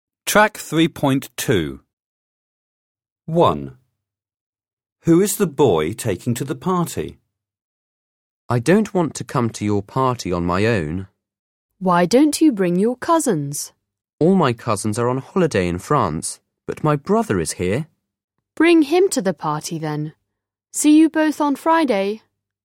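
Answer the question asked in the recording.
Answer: his brother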